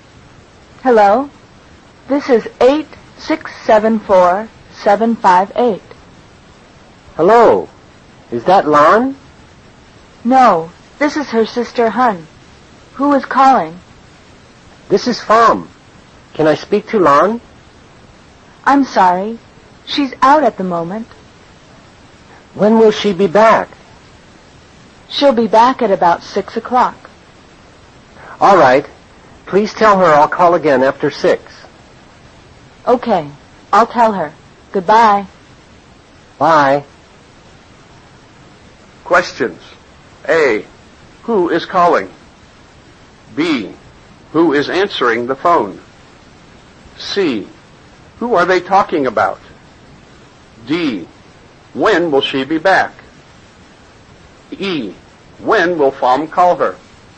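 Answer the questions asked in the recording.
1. Pham
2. Hun, Lan's sister
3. Lan
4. At about 6 o'clock
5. After 6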